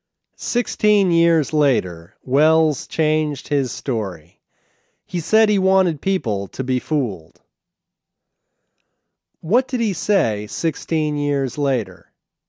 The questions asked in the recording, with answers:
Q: What did he say 16 years later?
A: He said he wanted people to be fooled.